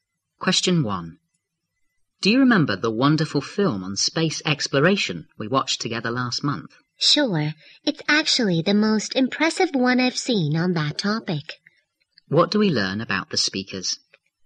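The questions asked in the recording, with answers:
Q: What do we learn about the speakers?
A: They watched an impressive film on space exploration together last month.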